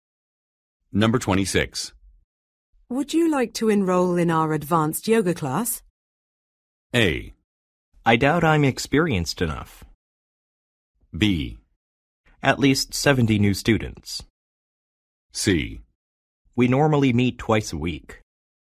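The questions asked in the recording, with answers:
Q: Would you like to enroll in our advanced yoga class?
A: A: I doubt I'm experienced enough.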